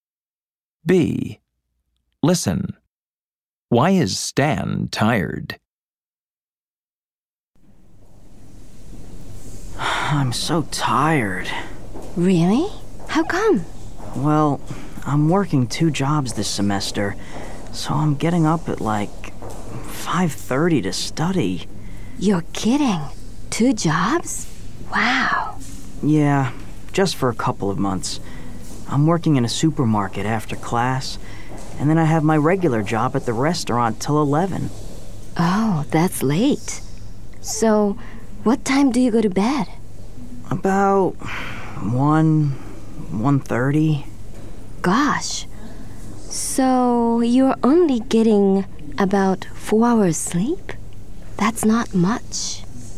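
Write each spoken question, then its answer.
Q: Why is Stan tired?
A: He's working two jobs, so he gets up at 5:30 and only sleeps about 4 hours.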